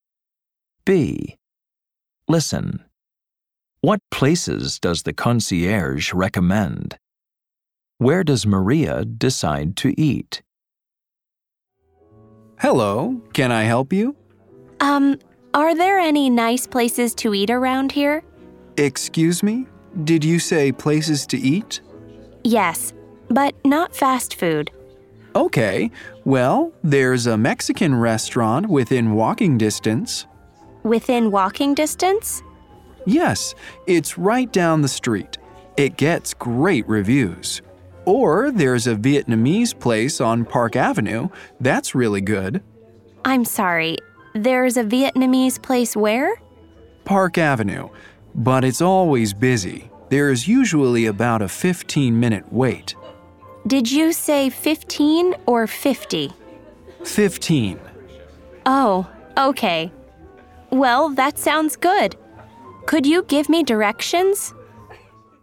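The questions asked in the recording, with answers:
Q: What places does the concierge recommend?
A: A Mexican restaurant within walking distance and a Vietnamese place on Park Avenue

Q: Where does Maria decide to eat?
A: The Vietnamese place on Park Avenue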